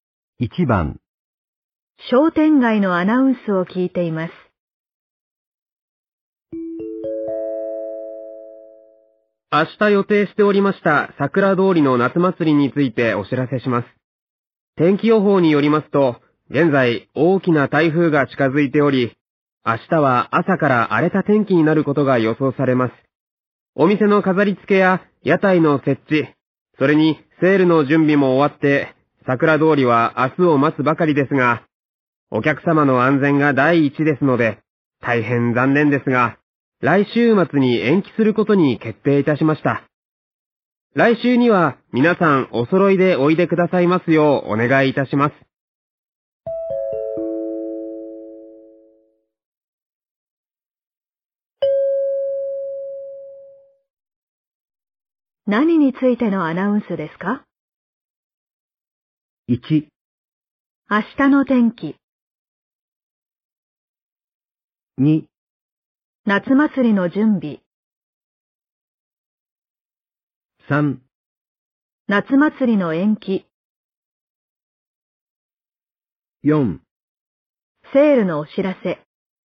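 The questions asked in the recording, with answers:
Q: 何についてのアナウンスですか?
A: 3: 夏祭りの延期。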